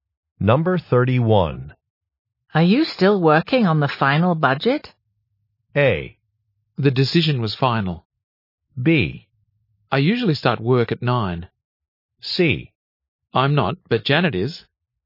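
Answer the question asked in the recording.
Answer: C: I'm not, but Janet is.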